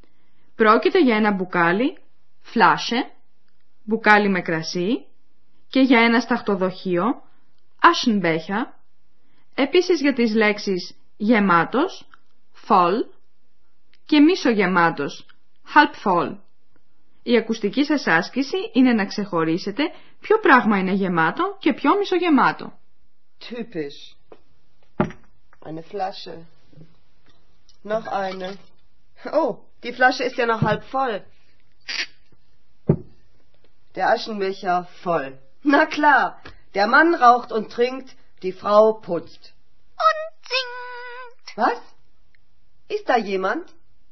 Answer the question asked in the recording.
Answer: Το σταχτοδοχείο είναι γεμάτο, ένα μπουκάλι με κρασί είναι μισογεμάτο.